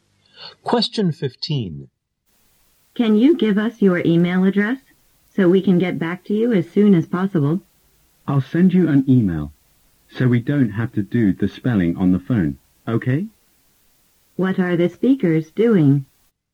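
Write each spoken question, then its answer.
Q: What are the speakers doing?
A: Talking on the phone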